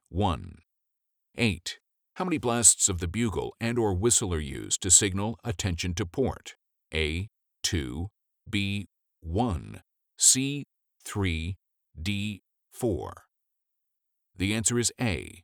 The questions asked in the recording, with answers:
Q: How many blasts of the bugle and or whistle are used to signal attention to port?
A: The answer is A. 2.